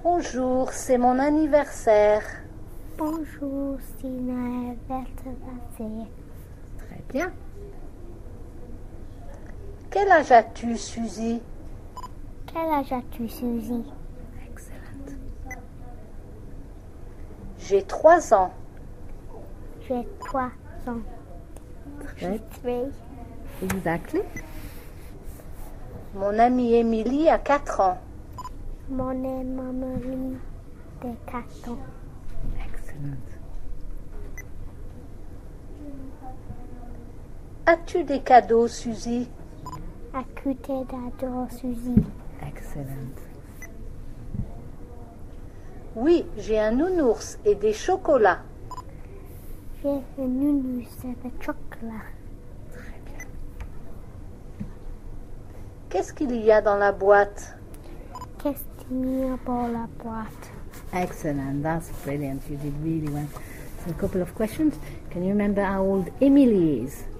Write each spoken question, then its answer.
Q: Can you remember how old Emily is?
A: Mon amie Émilie a 4 ans.